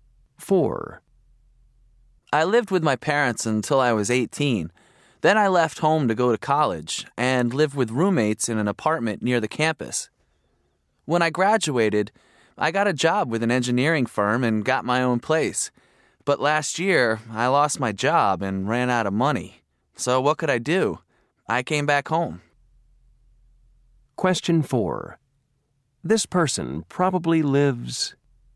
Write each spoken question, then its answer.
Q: This person probably lives...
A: Boy, it's not easy living with your parents again after all these years.